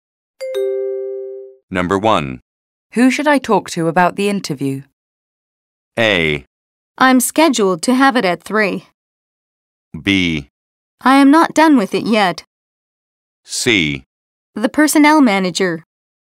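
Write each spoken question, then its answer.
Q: Who should I talk to about the interview?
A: C: The personnel manager.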